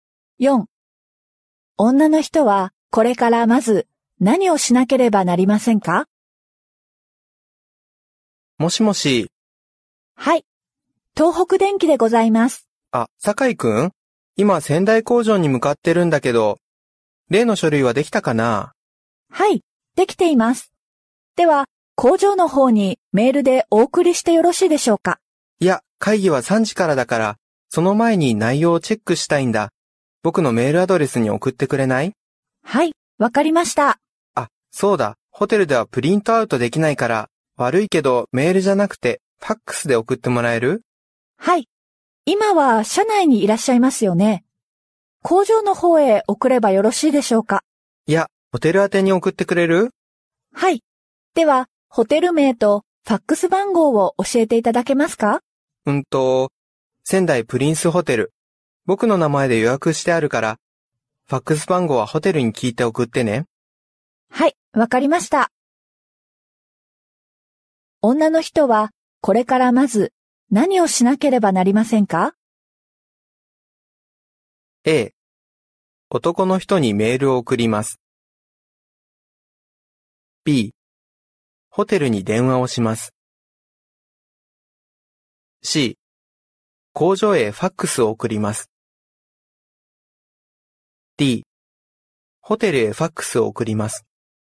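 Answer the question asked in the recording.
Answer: B: ホテルに電話をします。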